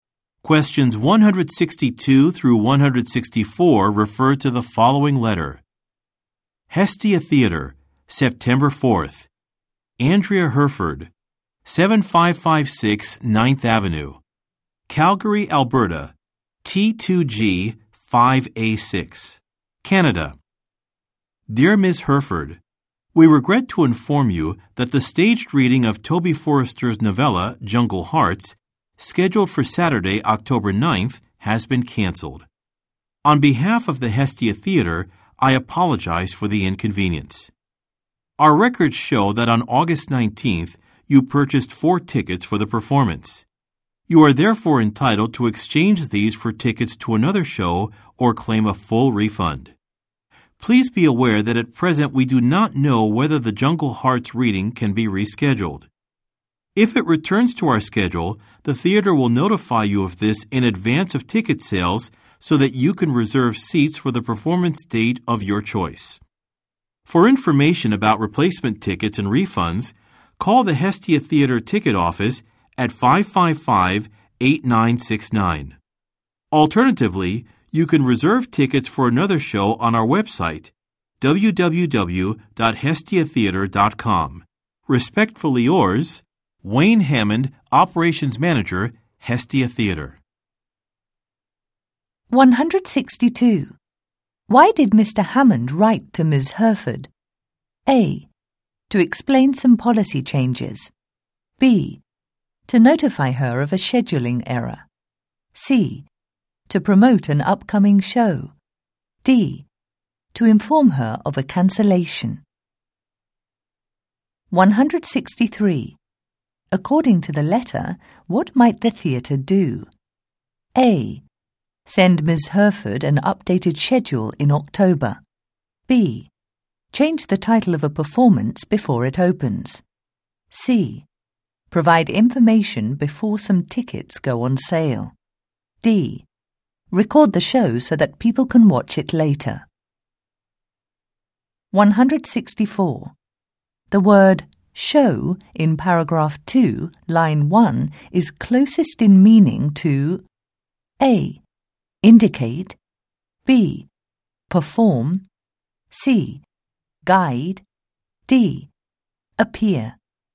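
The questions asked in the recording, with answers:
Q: Why did Mr. Hammond write to Ms. Herford?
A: D: To inform her of a cancellation.

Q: According to the letter, what might the theatre do?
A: C: Provide information before some tickets go on sale.

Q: The word Show in paragraph 2, line 1 is closest in meaning to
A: A: Indicate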